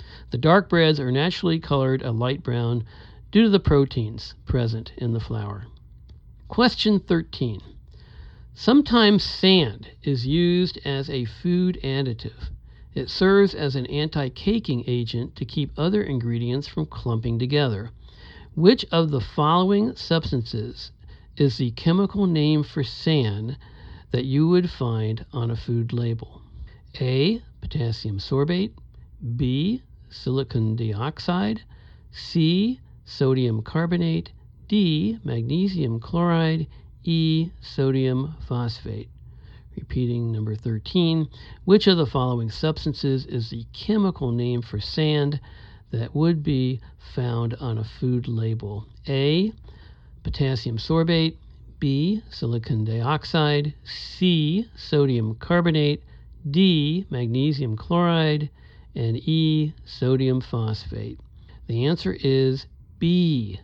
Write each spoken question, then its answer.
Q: Which of the following substances is the chemical name for sand that you would find on a food label?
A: The answer is B. Silicon dioxide.